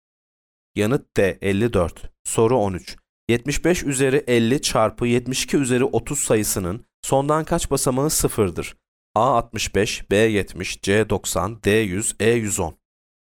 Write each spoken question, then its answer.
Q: 75 üzeri 50 çarpı 72 üzeri 30 sayısının sondan kaç basamağı sıfırdır?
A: Yanıt C 90.